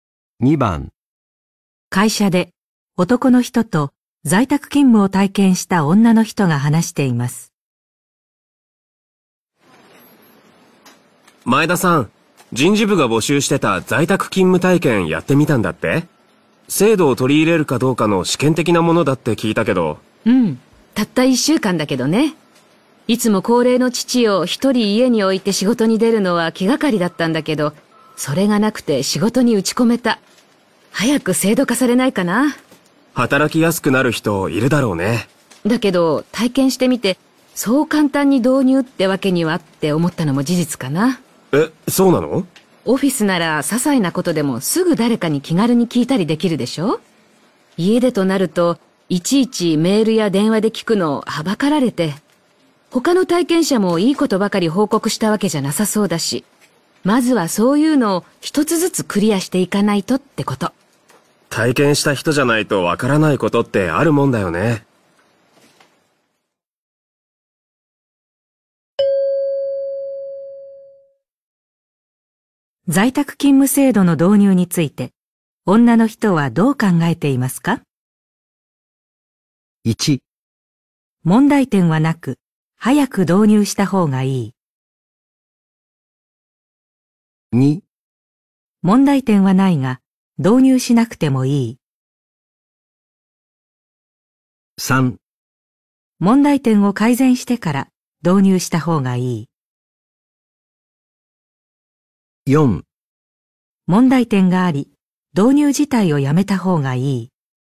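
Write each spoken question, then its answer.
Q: 在宅勤務制度の導入について、女の人はどう考えていますか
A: 3: 問題点を改善してから導入した方がいい。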